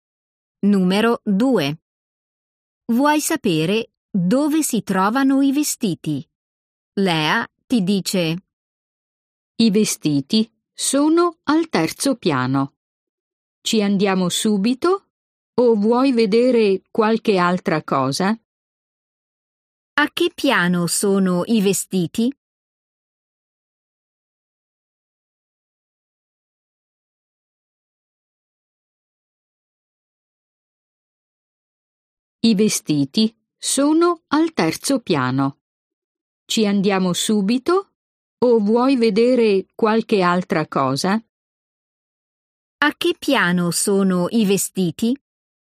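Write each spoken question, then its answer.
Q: A che piano sono i vestiti?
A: al terzo piano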